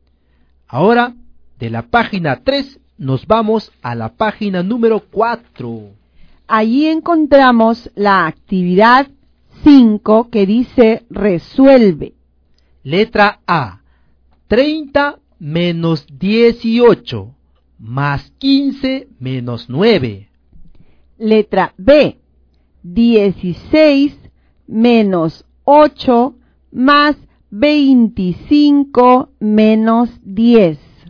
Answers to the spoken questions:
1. En la letra A, la respuesta es 18.
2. En la letra B, te debe haber salido 23.